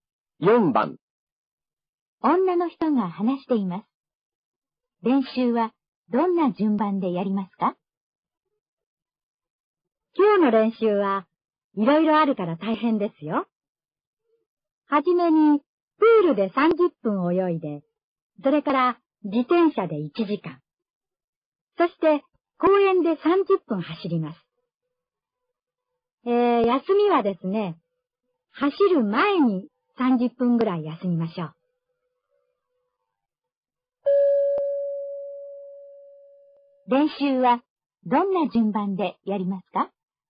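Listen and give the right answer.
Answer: 水泳(30分)→自転車(1時間)→休み(30分)→走る(30分)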